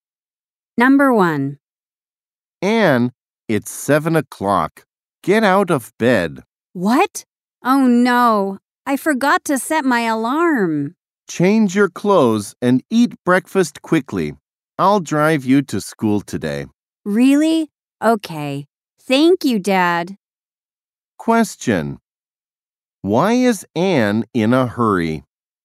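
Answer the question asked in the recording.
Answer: She forgot to set her alarm and got up late.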